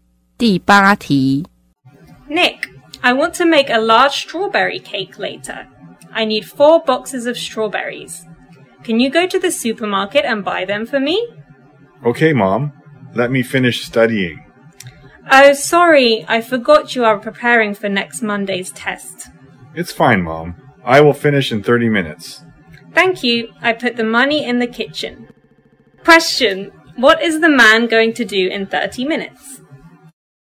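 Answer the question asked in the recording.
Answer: Go to the supermarket to buy strawberries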